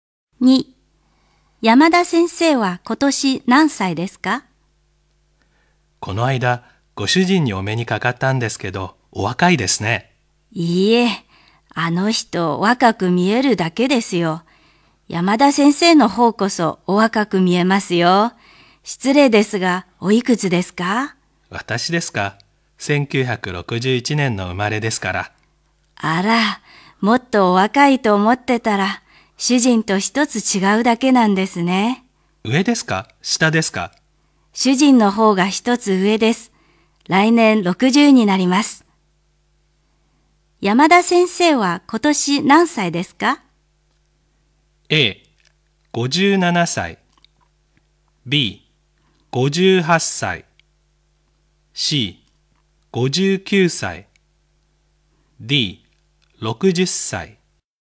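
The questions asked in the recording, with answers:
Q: 山田先生は今年何歳ですか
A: B: 58歳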